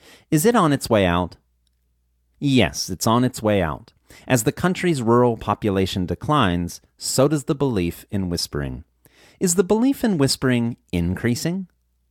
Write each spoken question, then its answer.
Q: Is the belief in whispering increasing?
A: No, the belief in whispering is not increasing.